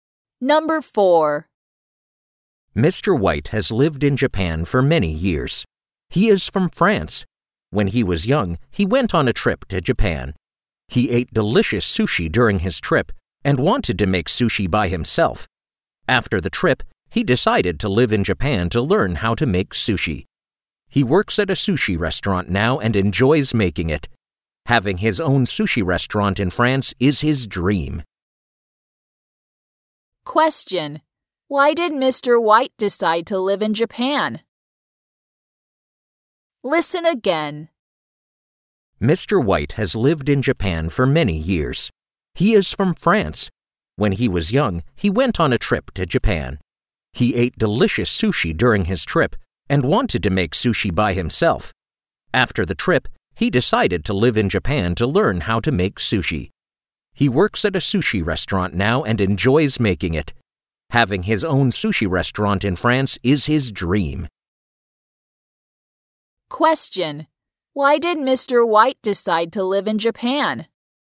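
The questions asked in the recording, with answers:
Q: Why did Mr. White decide to live in Japan?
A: To learn how to make sushi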